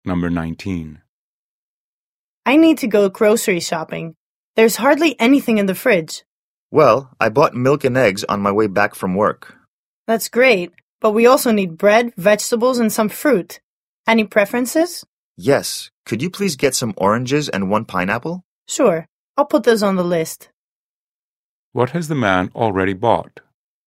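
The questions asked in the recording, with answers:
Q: What has the man already bought?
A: Milk and eggs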